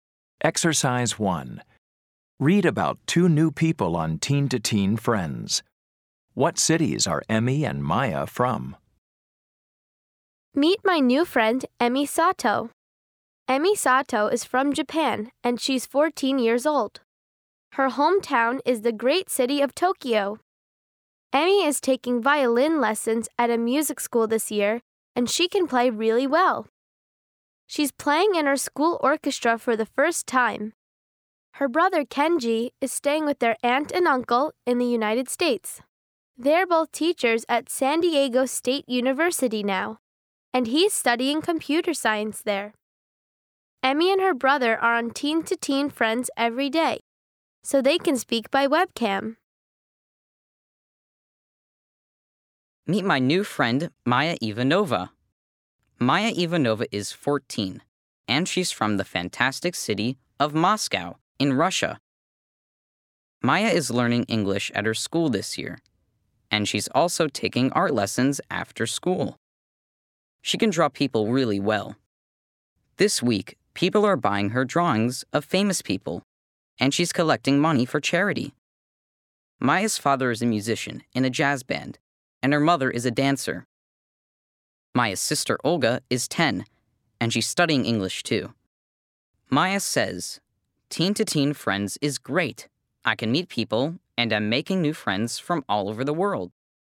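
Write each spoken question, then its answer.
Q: What cities are Emmy and Maya from?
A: Emmy is from Tokyo and Maya is from Moscow.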